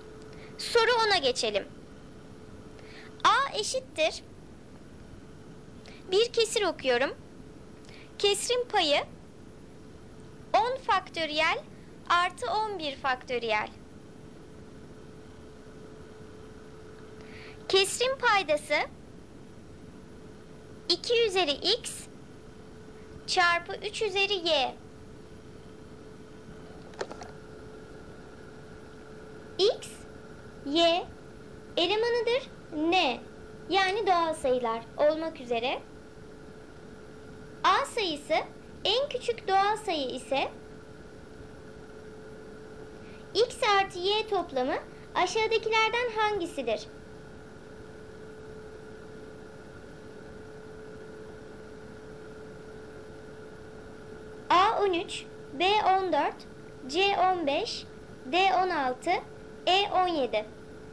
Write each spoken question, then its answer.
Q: x artı y toplamı aşağıdakilerden hangisidir?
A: Doğru cevap C 15.